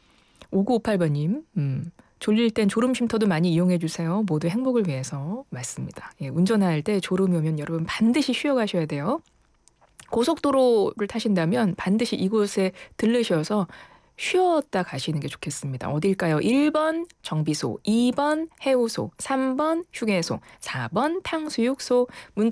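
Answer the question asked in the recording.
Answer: 3: 휴게소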